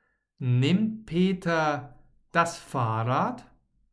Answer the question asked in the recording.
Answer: Nein, Peter nimmt nicht das Fahrrad, sondern das Auto.